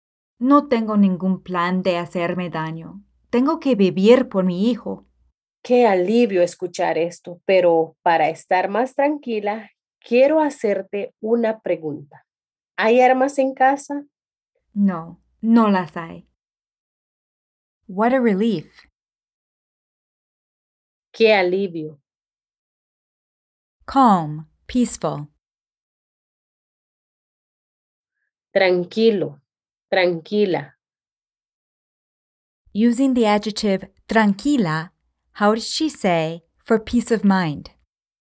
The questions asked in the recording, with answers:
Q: Using the adjective tranquila, how does she say for peace of mind?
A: Para estar más tranquila.